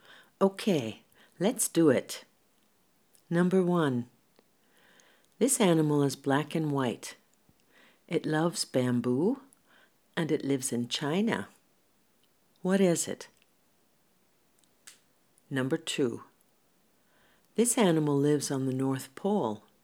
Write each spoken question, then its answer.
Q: What is it?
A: That's right, it's a panda bear.